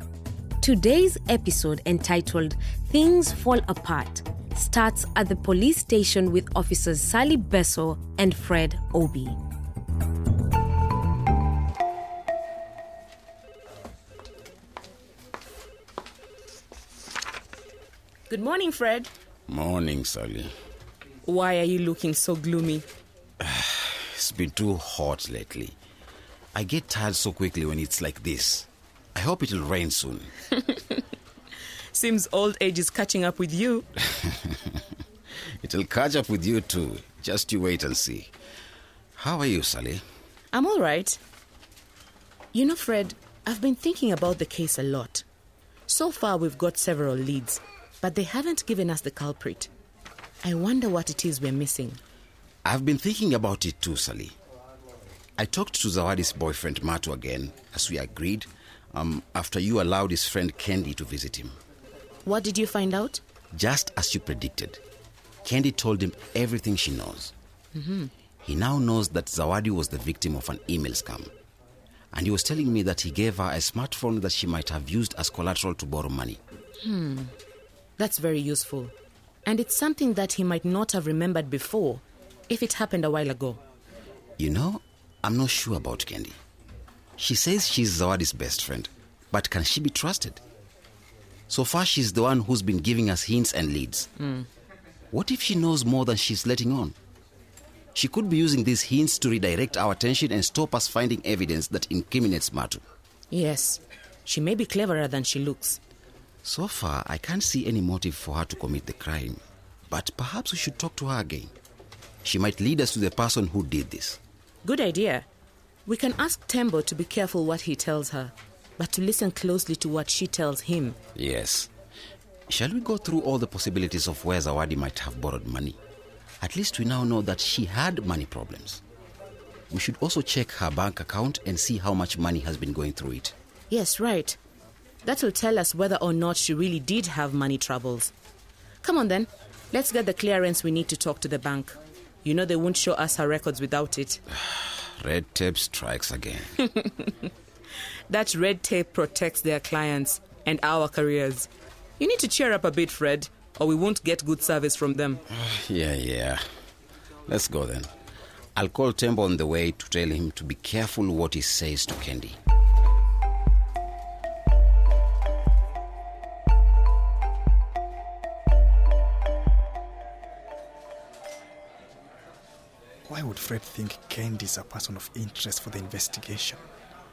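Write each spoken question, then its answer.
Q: Why would Fred think Kendi is a person of interest for the investigation?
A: She has been giving them all the hints and leads, and she might know more than she says. She could be using the hints to draw attention away from evidence against Matu.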